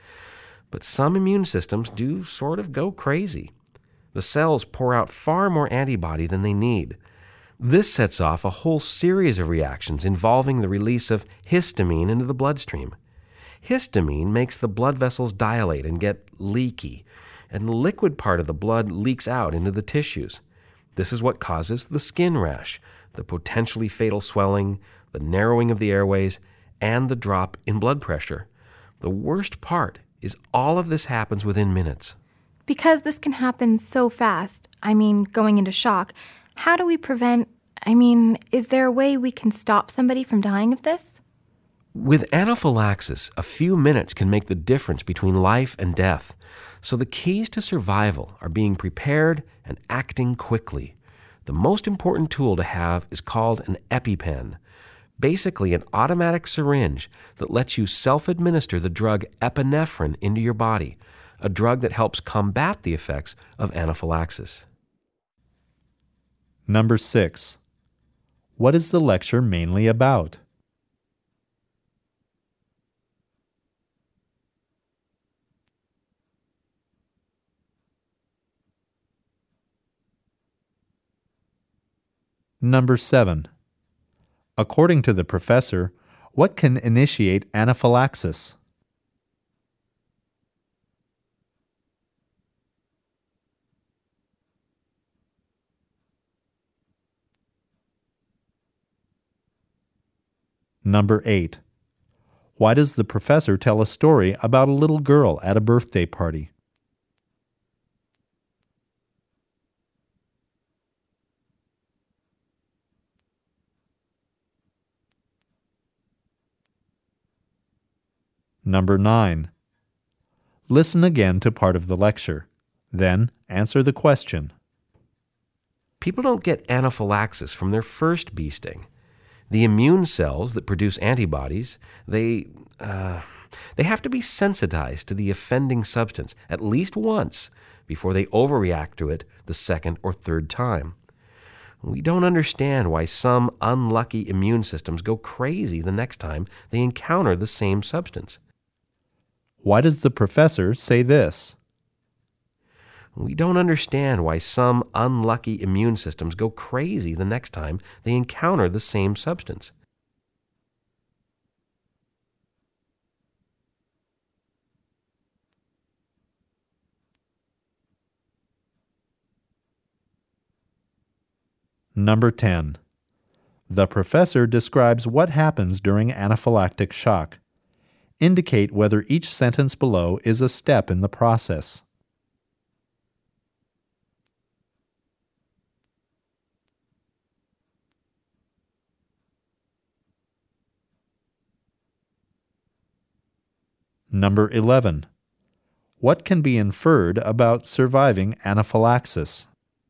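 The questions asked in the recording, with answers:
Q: What can be inferred about surviving anaphylaxis?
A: It depends on being prepared and acting quickly, e.g. using an EpiPen within minutes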